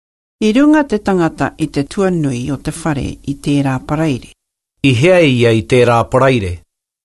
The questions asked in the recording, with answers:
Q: I hea ia i tērā paraire.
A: I runga i te tuanui o te whare.